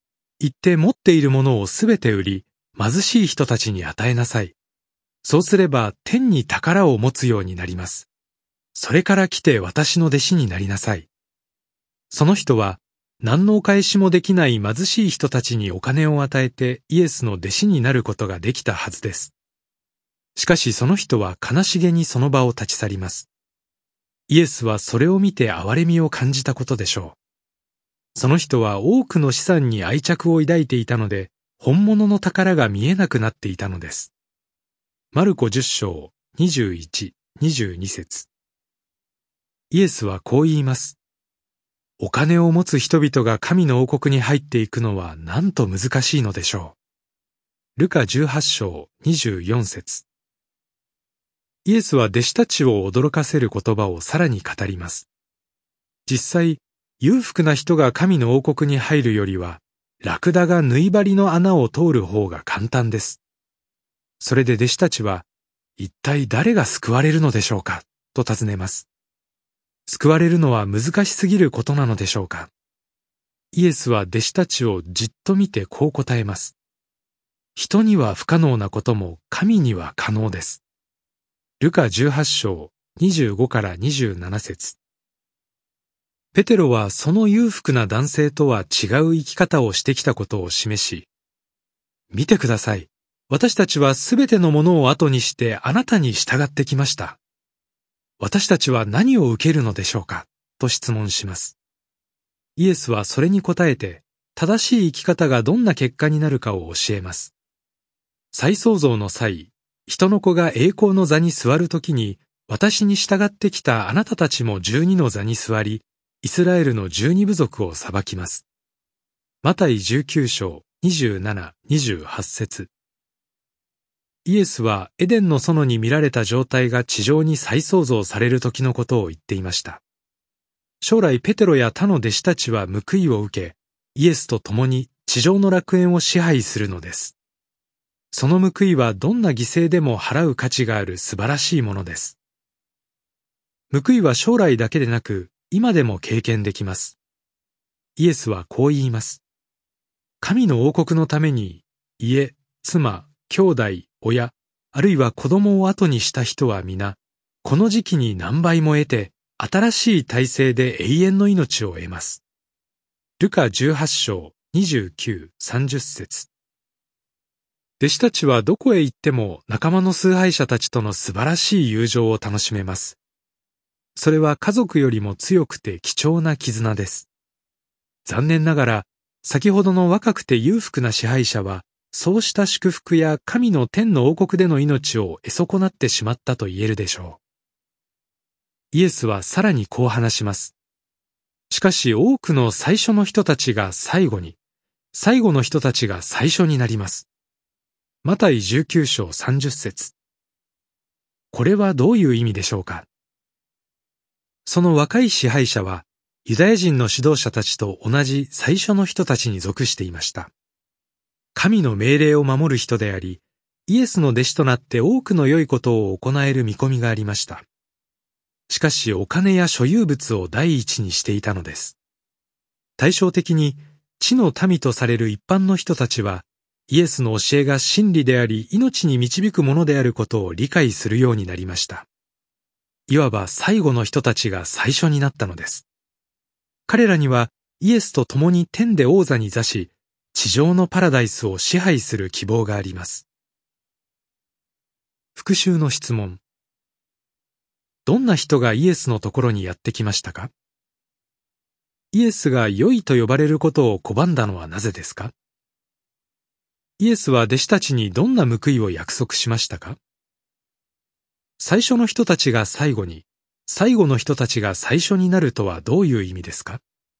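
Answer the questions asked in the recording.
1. 若くて裕福な支配者
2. 十二の座に座りイスラエルの十二部族を裁き、地上の楽園を支配する。今も何倍も得て、永遠の命を得る
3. お金や所有物を第一にした若い支配者やユダヤ人の指導者など最初の人たちは報いを失い、イエスの教えを受け入れた一般の人たちが天で王座に座す希望を得る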